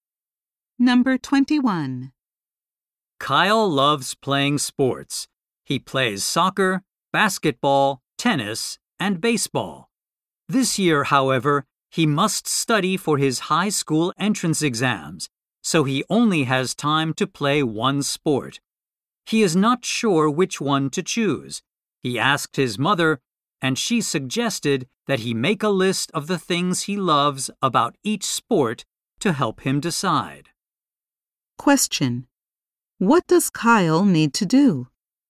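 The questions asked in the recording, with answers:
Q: What does Kyle need to do?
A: Choose one sport to play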